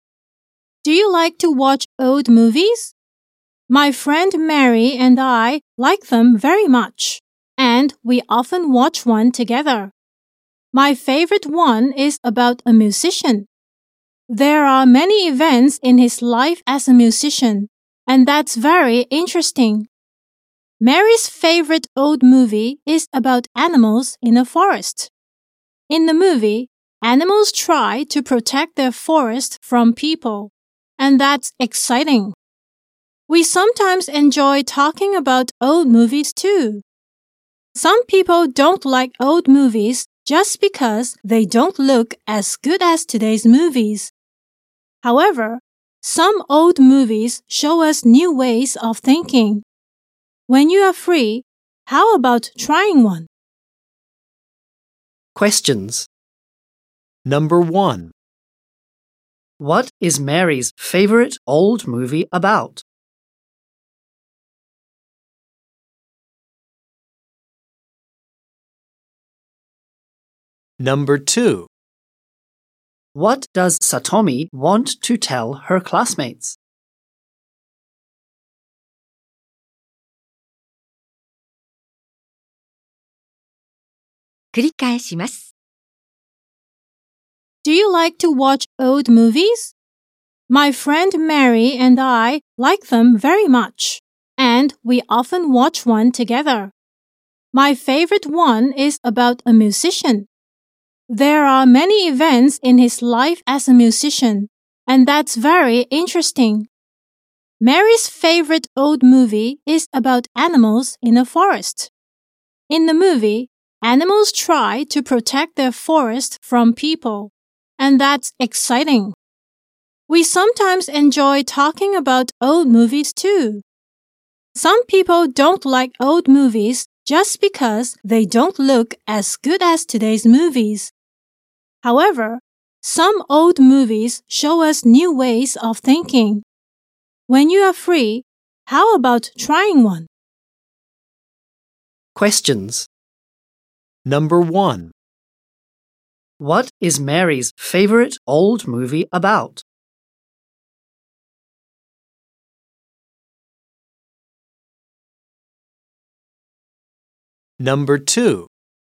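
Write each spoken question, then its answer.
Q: What is Mary's favorite old movie about?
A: Animals in a forest trying to protect their forest from people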